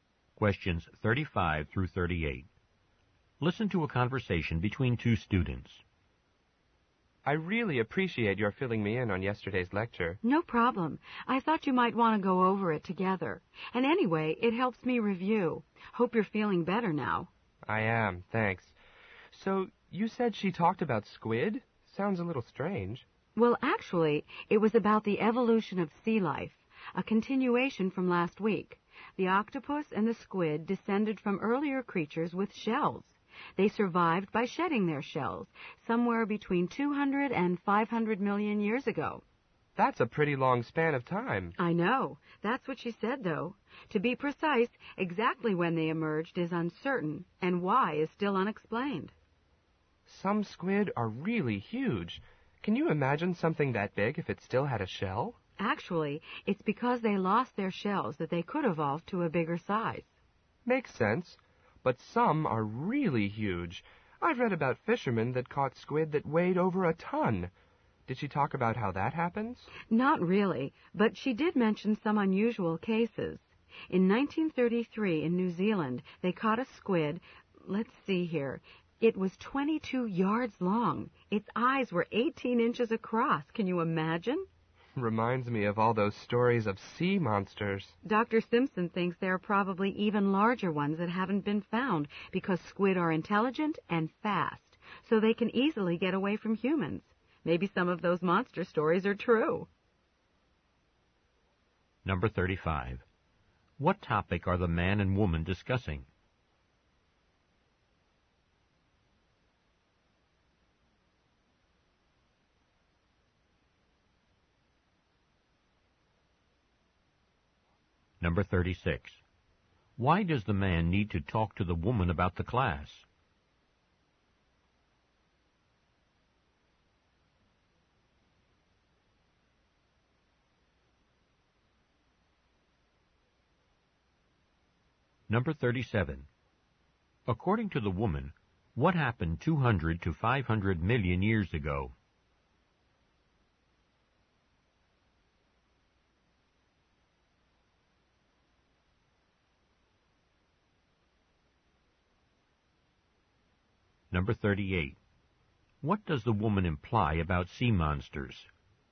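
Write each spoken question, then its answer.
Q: What topic are the man and woman discussing?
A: The evolution of squid

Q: Why does the man need to talk to the woman about the class?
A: He missed the lecture because he was sick

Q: According to the woman, what happened 200 to 500 million years ago?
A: Squid and octopus lost their shells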